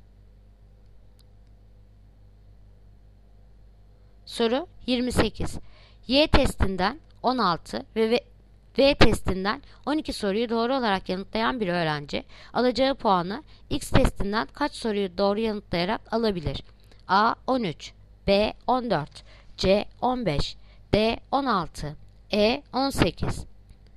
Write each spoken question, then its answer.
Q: Y testinden 16 ve V testinden 12 soruyu doğru olarak yanıtlayan bir öğrenci alacağı puanı X testinden kaç soruyu doğru yanıtlayarak alabilir?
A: Yanıt Ceyhan 15.